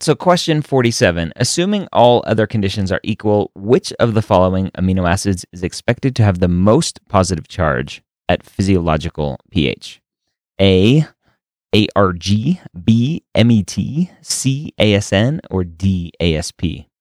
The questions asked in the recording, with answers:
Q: Assuming all other conditions are equal, which of the following amino acids is expected to have the most positive charge at physiological pH?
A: So the answer choice here is A.